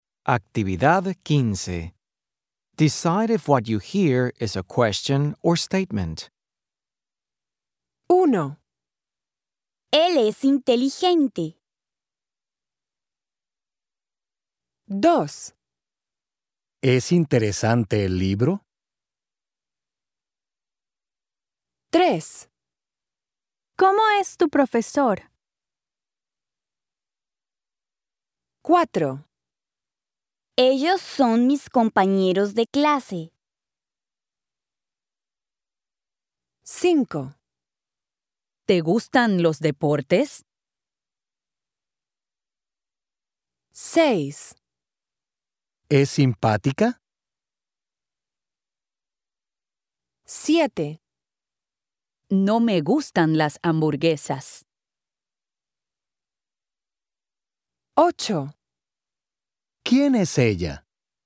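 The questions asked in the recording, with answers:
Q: Él es inteligente.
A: statement

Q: ¿Es interesante el libro?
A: question

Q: ¿Cómo es tu profesor?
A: question

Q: Ellos son mis compañeros de clase.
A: statement

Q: ¿Te gustan los deportes?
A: question

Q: ¿Es simpática?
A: question

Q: No me gustan las hamburguesas.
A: statement

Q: ¿Quién es ella?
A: question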